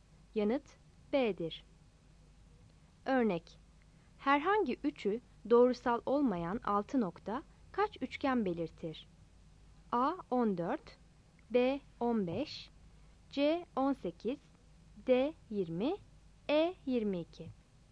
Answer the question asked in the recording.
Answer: Yanıt D'dir.